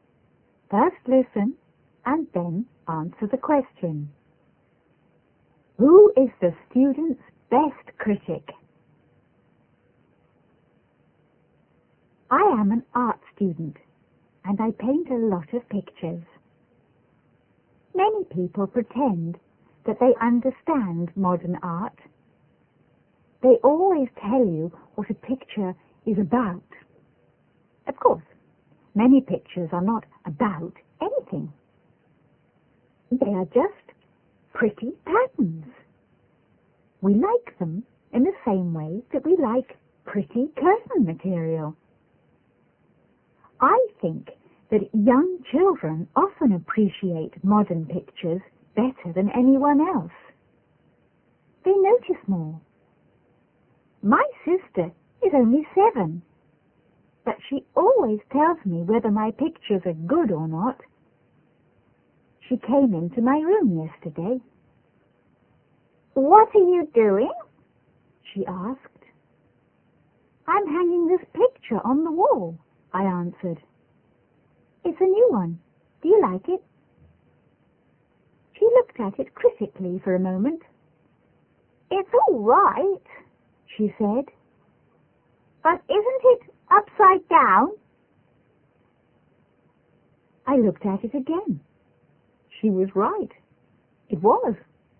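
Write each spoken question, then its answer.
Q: Who is the student's best critic?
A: His 7-year-old sister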